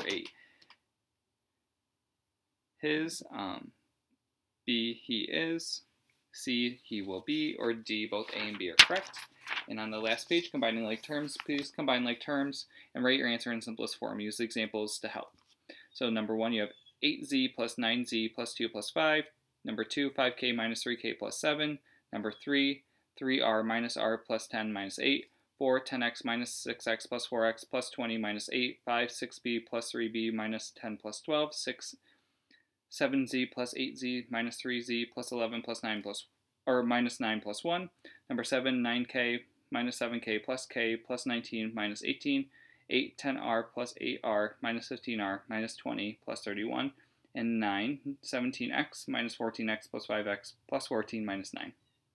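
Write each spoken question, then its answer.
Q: 8Z plus 9Z plus 2 plus 5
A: 17z + 7

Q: 5K minus 3K plus 7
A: 2k + 7

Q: 3r minus r plus 10 minus 8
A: 2r + 2

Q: 10x minus 6x plus 4x plus 20 minus 8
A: 8x + 12

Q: 6b plus 3b minus 10 plus 12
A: 9b + 2

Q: 9k minus 7k plus k plus 19 minus 18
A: 3k + 1

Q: 10r plus 8r minus 15r minus 20 plus 31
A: 3r + 11

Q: 17x minus 14x plus 5x plus 14 minus 9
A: 8x + 5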